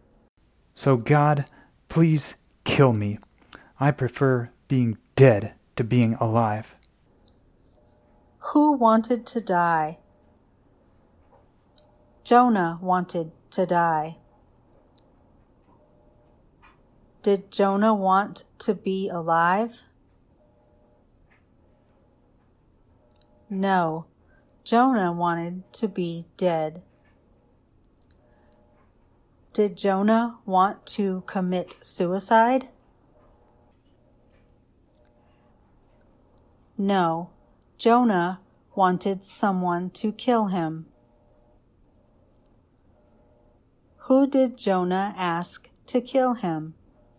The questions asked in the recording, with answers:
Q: Who did Jonah ask to kill him?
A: Jonah asked God to kill him.